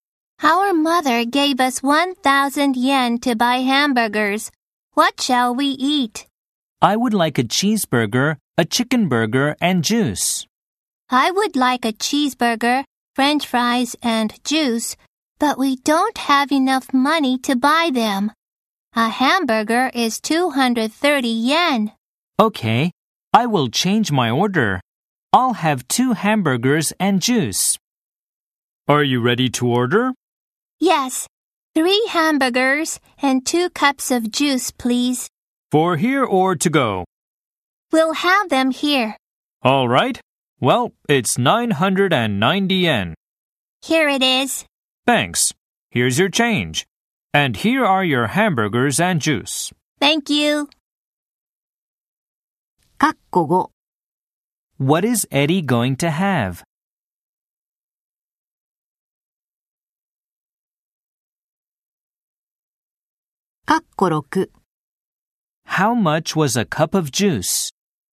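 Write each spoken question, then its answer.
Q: How much was a cup of juice?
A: 150 yen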